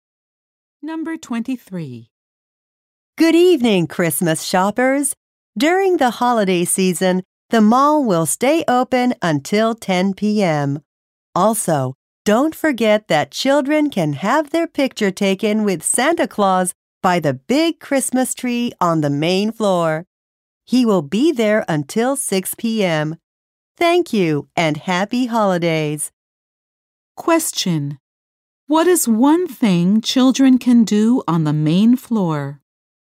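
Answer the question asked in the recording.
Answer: Have their picture taken with Santa Claus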